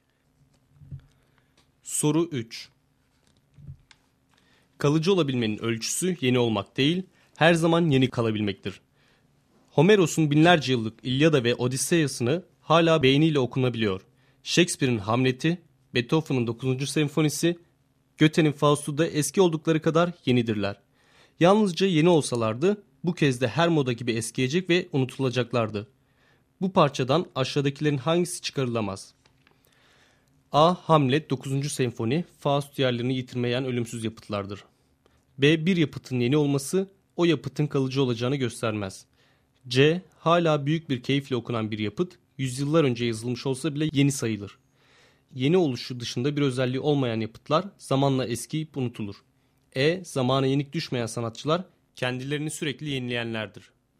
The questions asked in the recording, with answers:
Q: Bu parçadan aşağıdakilerin hangisi çıkarılamaz?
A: Doğru cevap E şıkkı.